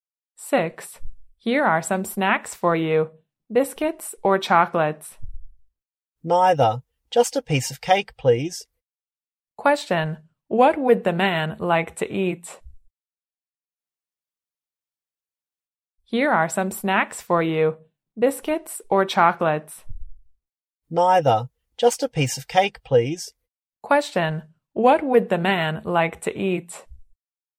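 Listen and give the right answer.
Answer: A piece of cake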